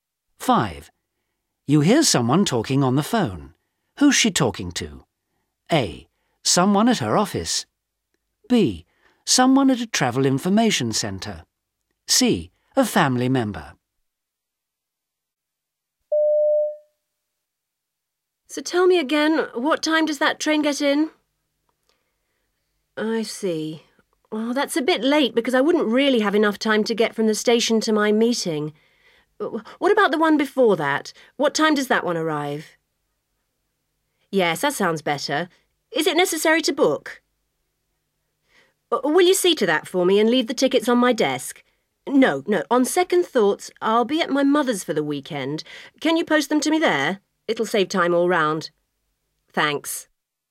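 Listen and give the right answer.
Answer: A: Someone at her office.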